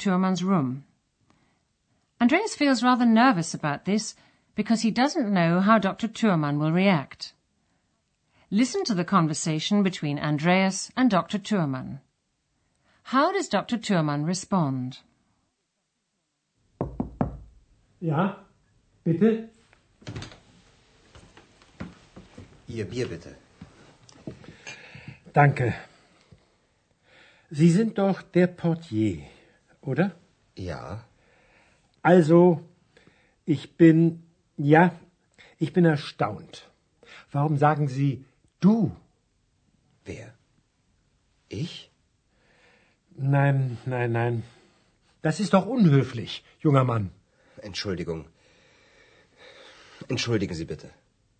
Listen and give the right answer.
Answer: He's surprised that Andreas has called him du, and he asks him why he's done so.